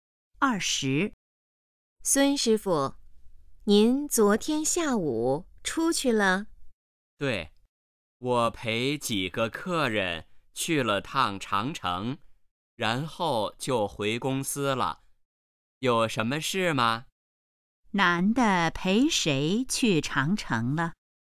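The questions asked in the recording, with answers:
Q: 男的陪谁去长城了?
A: 几个客人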